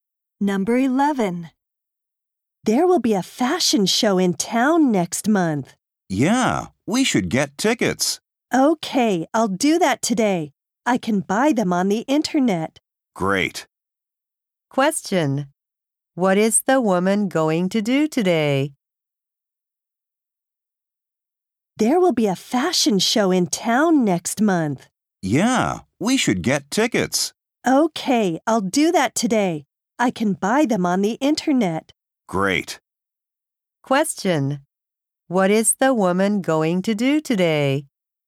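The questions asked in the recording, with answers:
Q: What is the woman going to do today?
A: Buy tickets for the fashion show on the internet.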